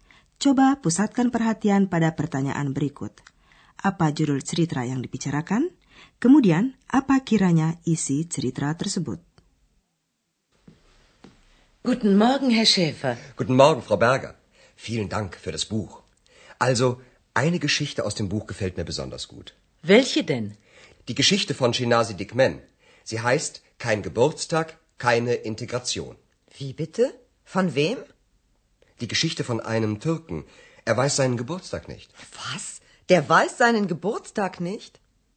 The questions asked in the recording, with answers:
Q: Apa judul cerita yang dibicarakan?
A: Jurul cerita itu, kein Geburtstag, keine Integration.